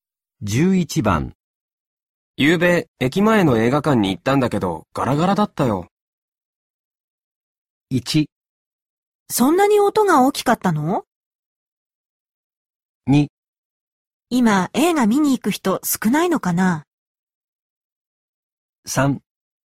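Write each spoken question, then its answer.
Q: ゆうべ駅前の映画館に行ったんだけどガラガラだったよ。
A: 2: 今映画見に行く人少ないのかな?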